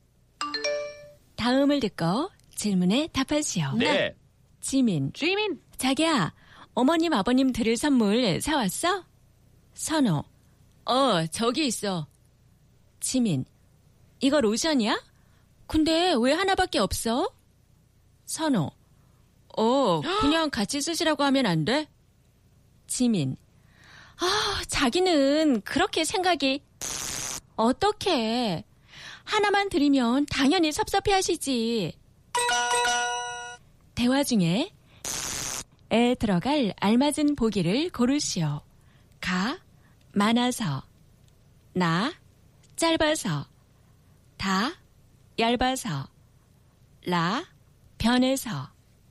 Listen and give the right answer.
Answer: 나, short. Shallow, 짧아서, 생각이 짧다.